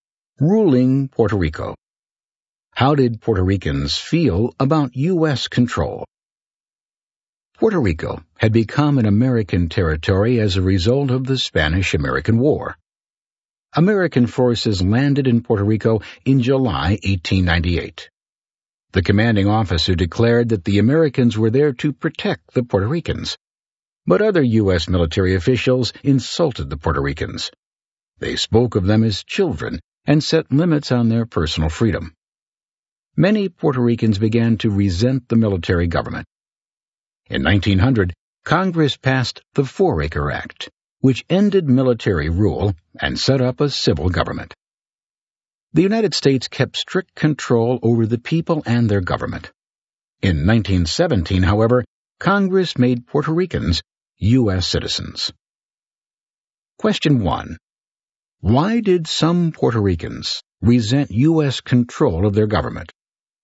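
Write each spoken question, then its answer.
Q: Why did some Puerto Ricans resent U.S. control of their government?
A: U.S. military officials insulted them, treated them like children and limited their personal freedom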